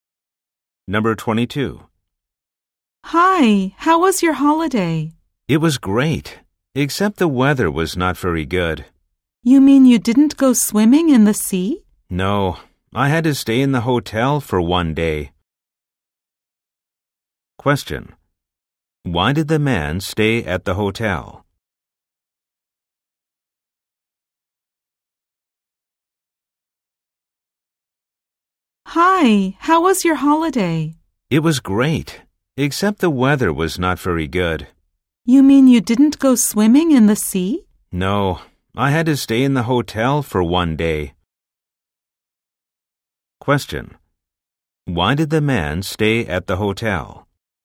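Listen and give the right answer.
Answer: Because the weather was not very good.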